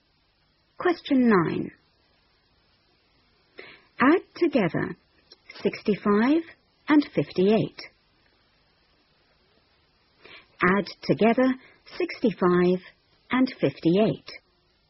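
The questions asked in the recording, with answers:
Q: Add together 65 and 58.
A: 123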